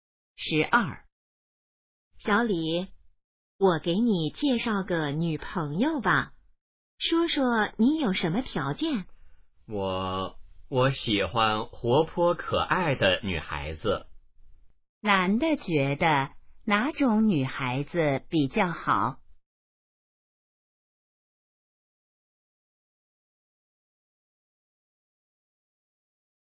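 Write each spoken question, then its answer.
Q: 男的觉得哪种女孩子比较好?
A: 活泼可爱的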